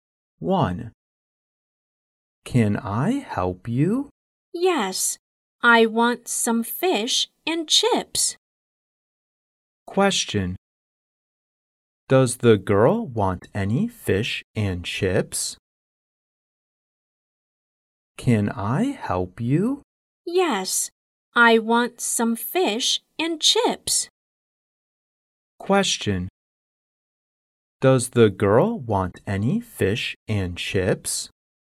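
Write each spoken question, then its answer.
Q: Does the girl want any fish and chips?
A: Yes, she does.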